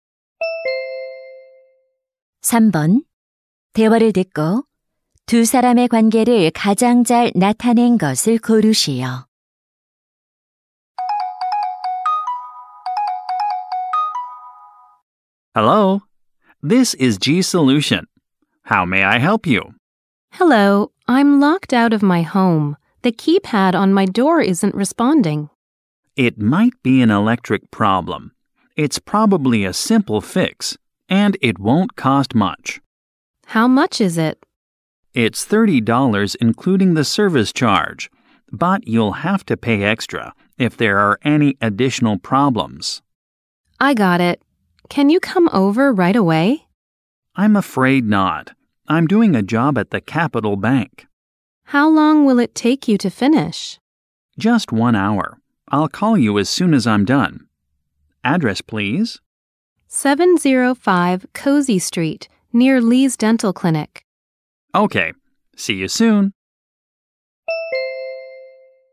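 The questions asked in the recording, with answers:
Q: 대화를 듣고 두 사람의 관계를 가장 잘 나타낸 것을 고르시오.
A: 고객 — 도어락 수리 기사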